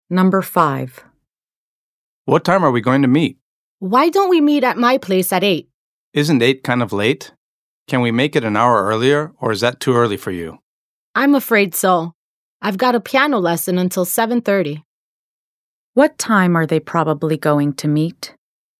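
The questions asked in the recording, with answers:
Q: What time are they probably going to meet?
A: At 8 o'clock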